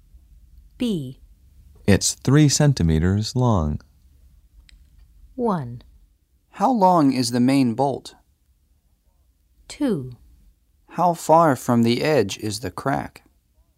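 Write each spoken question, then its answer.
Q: It's 3 centimeters long.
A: 1: How long is the main bolt?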